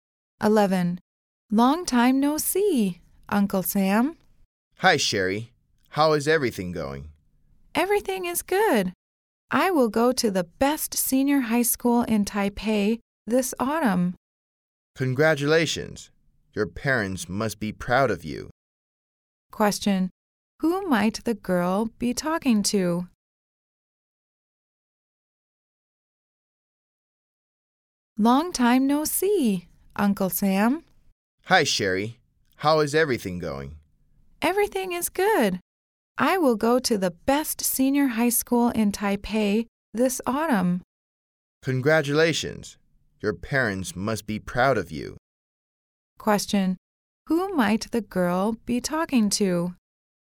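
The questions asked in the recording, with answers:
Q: Question. Who might the girl be talking to?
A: Her uncle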